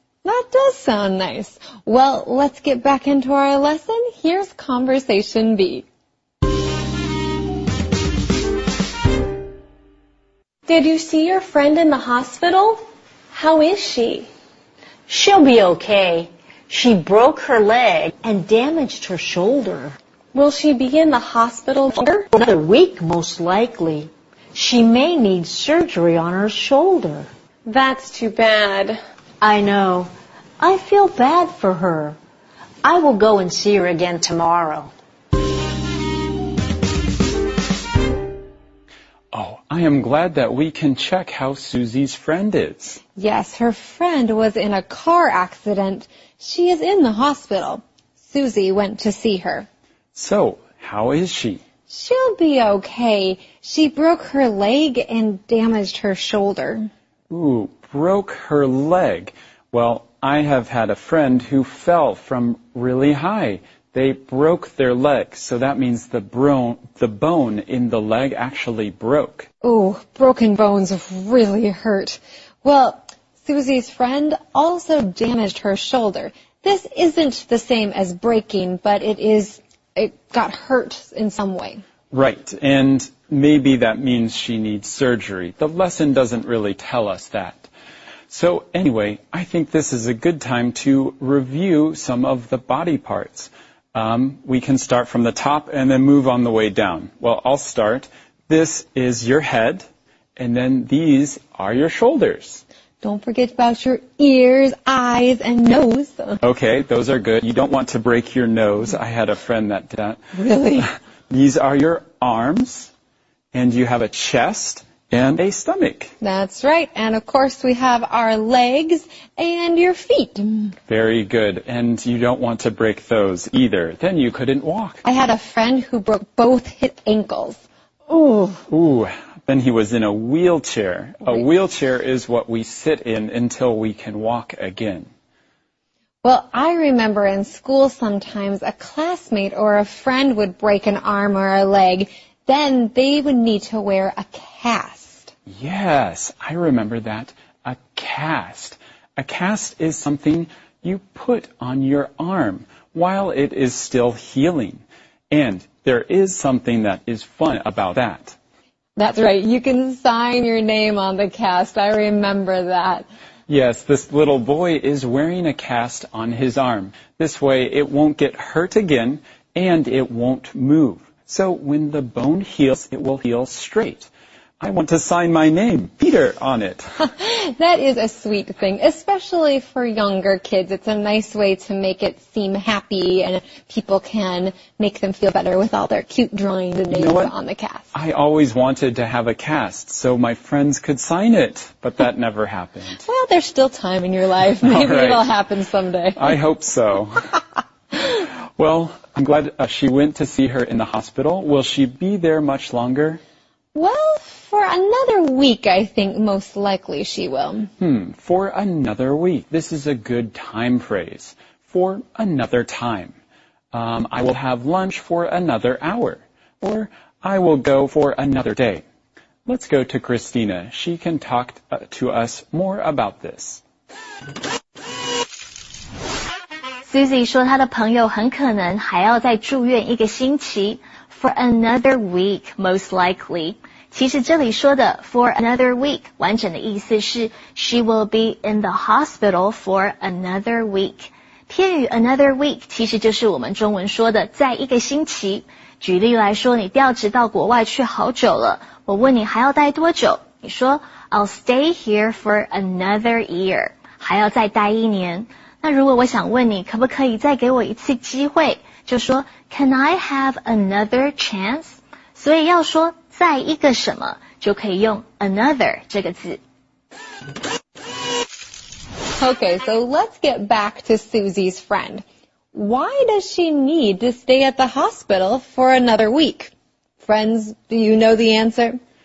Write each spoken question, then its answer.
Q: Why does she need to stay at the hospital for another week?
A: She may need surgery on her shoulder.